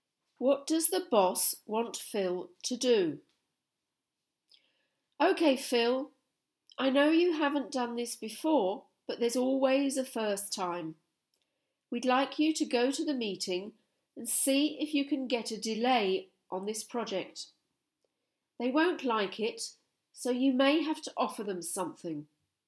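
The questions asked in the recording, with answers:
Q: What does the boss want Phil to do?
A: Go to the meeting and get a delay on the project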